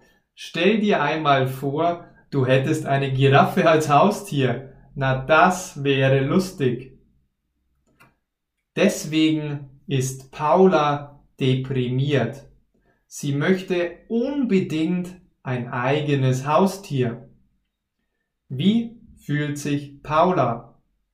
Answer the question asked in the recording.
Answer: Deprimiert. Sie fühlt sich beziehungsweise ist deprimiert.